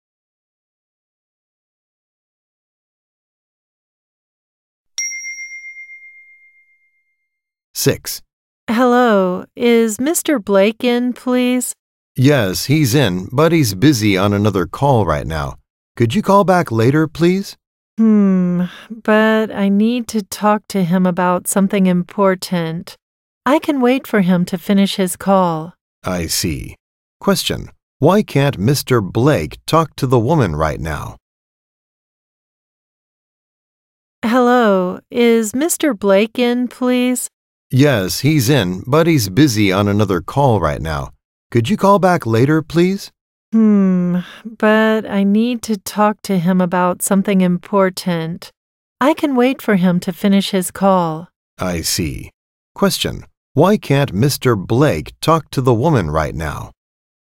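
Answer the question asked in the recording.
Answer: He is busy on another call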